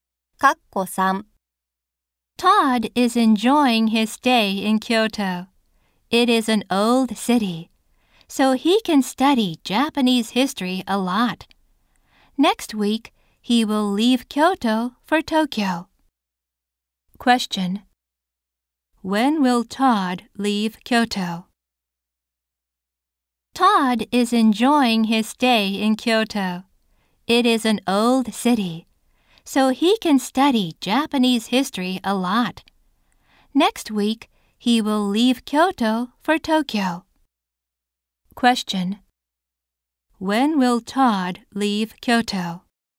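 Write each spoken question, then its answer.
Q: When will Todd leave Kyoto?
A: Next week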